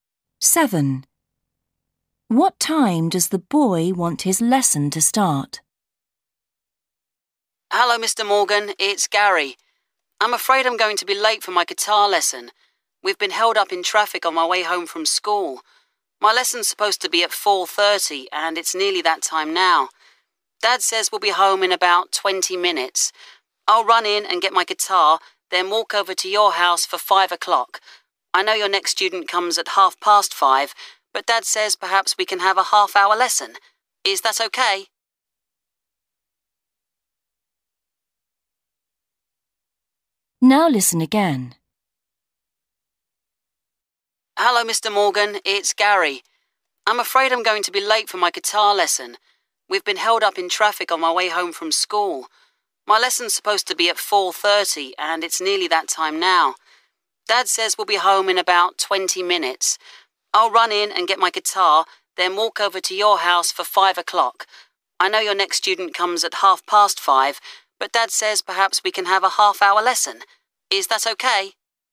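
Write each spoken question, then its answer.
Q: What time does the boy want his lesson to start?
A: 5 o'clock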